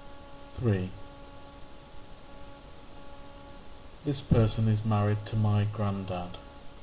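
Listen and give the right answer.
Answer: grandmother (grandma)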